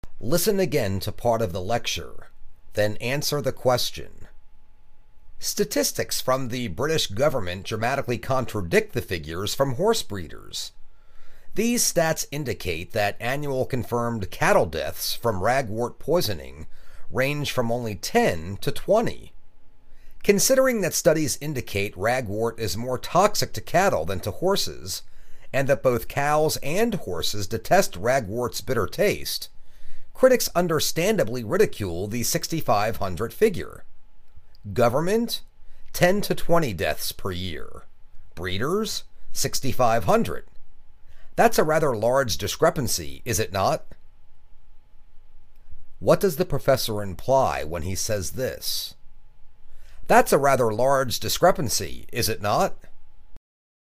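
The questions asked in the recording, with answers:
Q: What does the professor imply when he says this? That's a rather large discrepancy, is it not?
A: The breeders' figure of 6,500 deaths is probably greatly exaggerated and not believable.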